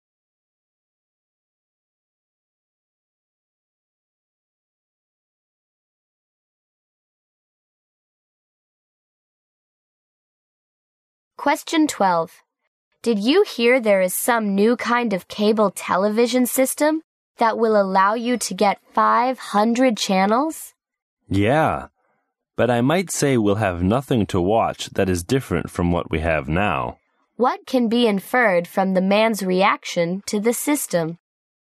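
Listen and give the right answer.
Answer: He thinks the 500 channels won't offer anything different from what is on now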